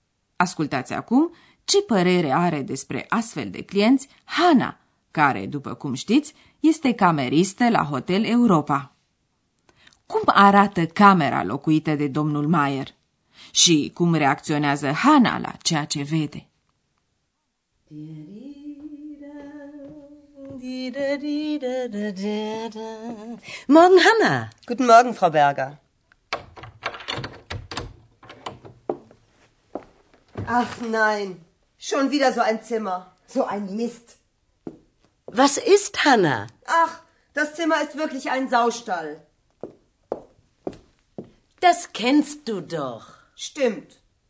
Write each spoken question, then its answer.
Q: Cum arată camera locuită de domnul Mayer?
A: După părerea Hanei, camera arată ca o cocină.

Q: Și cum reacționează Hana la ceea ce vede?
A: De aceea e furioasă și o cărăște.